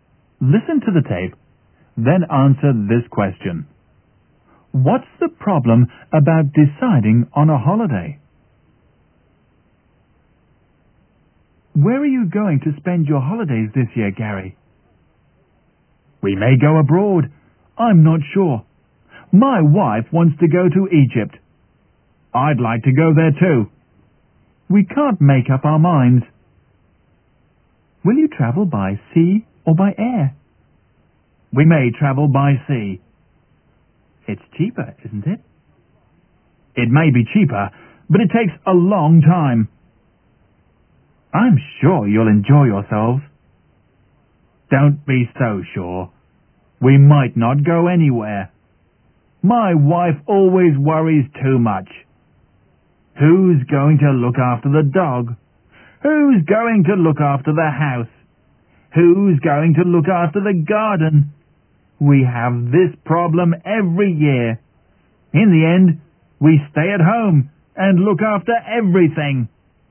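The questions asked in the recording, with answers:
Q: What's the problem about deciding on a holiday?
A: Gary's wife worries too much about who will look after the dog, the house and the garden, so they can't decide and end up staying at home.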